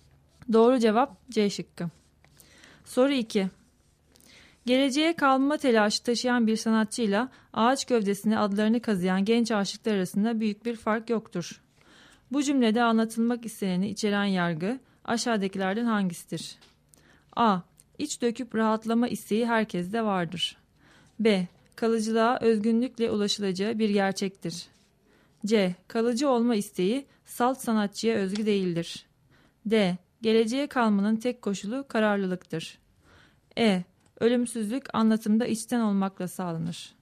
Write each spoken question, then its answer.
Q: Bu cümlede anlatılmak isteneni içeren yargı aşağıdakilerden hangisidir?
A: Doğru cevap C şıkkı.